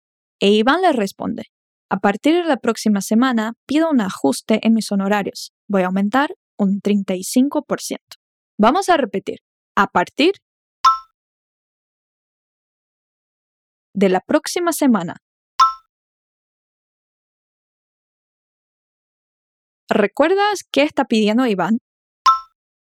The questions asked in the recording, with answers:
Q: ¿Recuerdas qué está pidiendo Iván?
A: Un ajuste en sus honorarios.